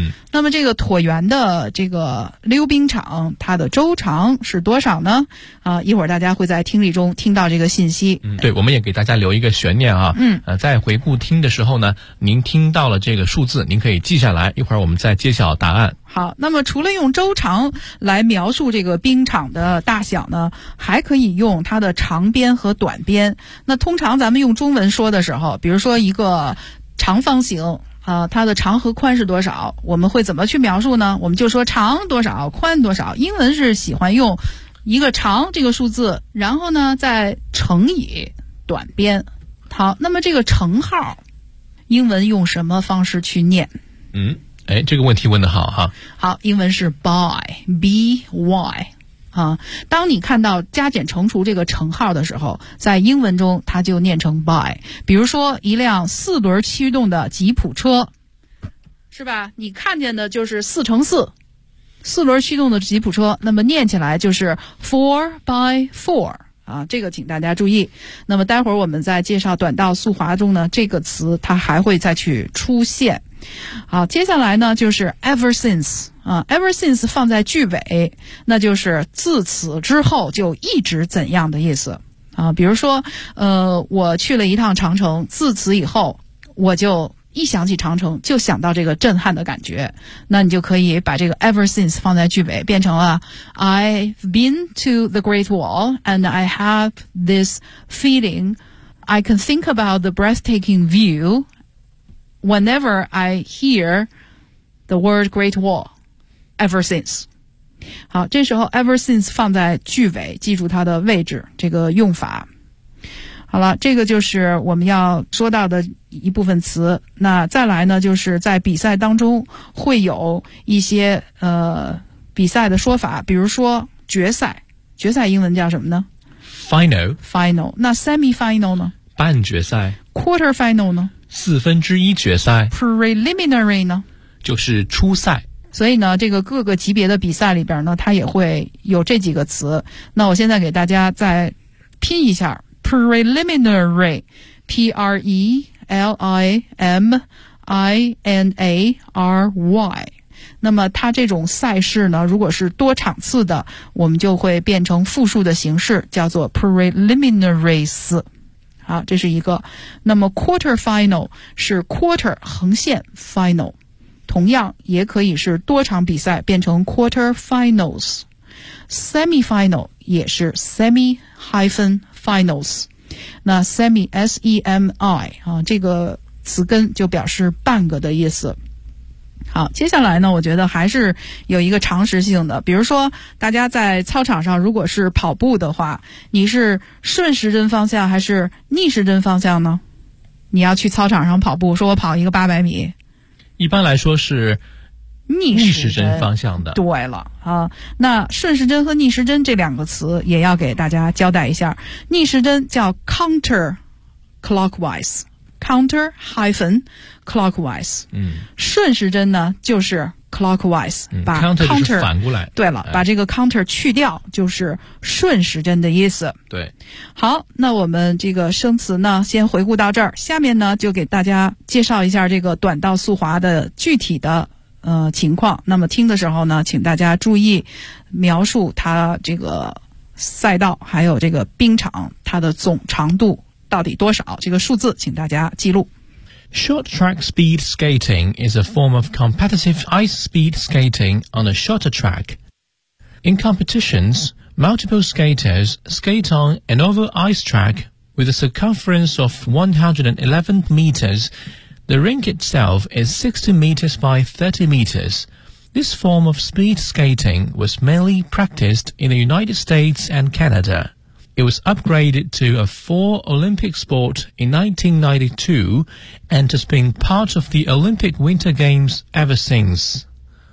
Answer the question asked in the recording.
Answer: 它是111米。